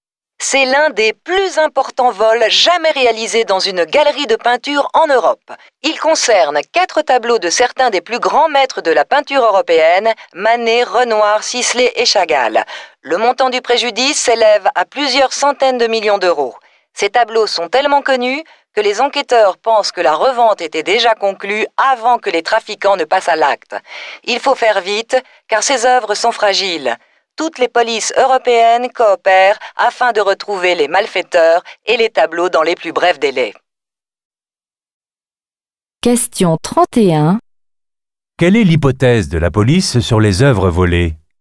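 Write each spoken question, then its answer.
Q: Quelle est l'hypothèse de la police sur les œuvres volées?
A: Elles étaient déjà revendues avant le vol.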